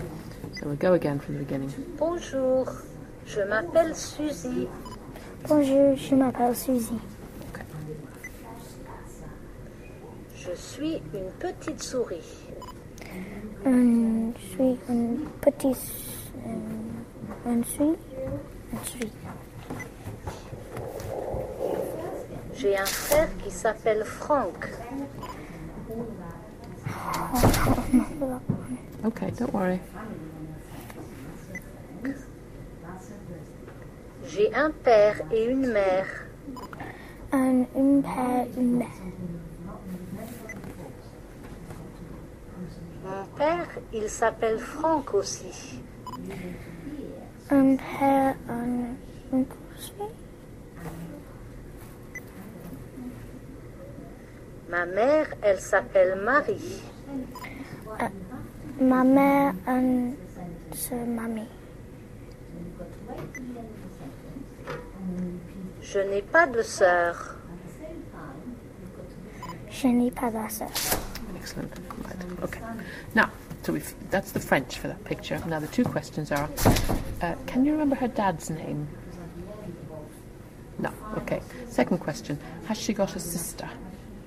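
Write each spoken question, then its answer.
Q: can you remember her dad's name?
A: Franck

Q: has she got a sister?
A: No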